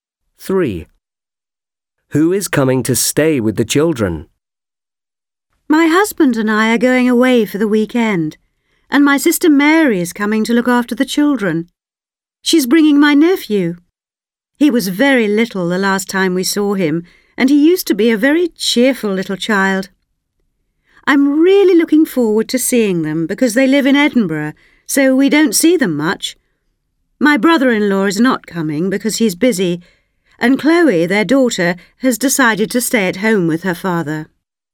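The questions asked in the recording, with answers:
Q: Who is coming to stay with the children?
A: her sister Mary and her nephew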